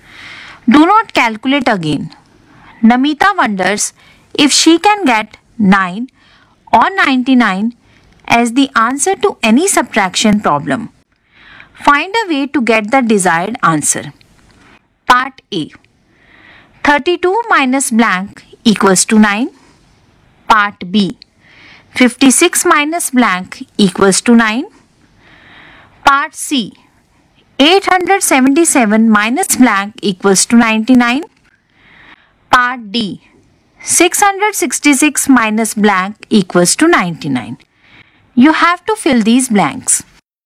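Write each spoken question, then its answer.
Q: Part A. 32 minus blank equals to 9.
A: 23

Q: Part B. 56 minus blank equals to 9.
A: 47

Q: Part C. 877 minus blank equals to 99.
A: 778

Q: Part D. 666 minus blank equals to 99.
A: 567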